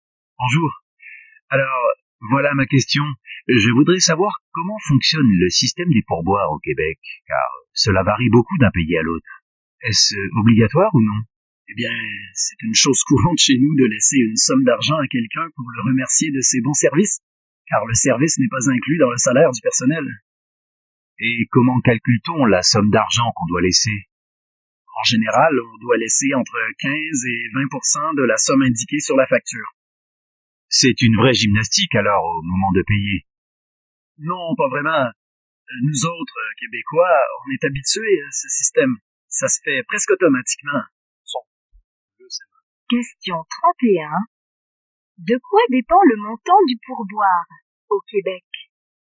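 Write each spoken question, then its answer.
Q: De quoi dépend le montant du pourboire au Québec?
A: De la somme indiquée sur la facture (15 à 20 %)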